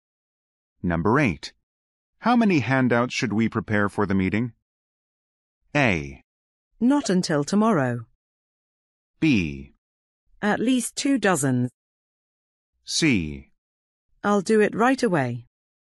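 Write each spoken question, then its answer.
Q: How many handouts should we prepare for the meeting?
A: B: At least 2 dozen.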